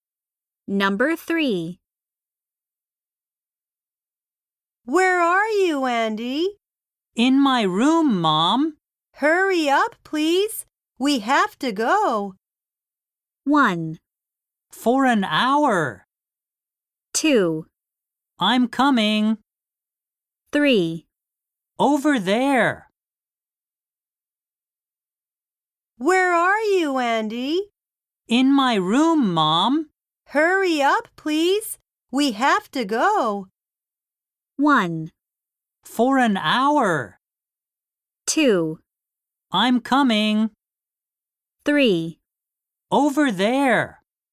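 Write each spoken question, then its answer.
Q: Hurry up, please. We have to go.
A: 2: I'm coming.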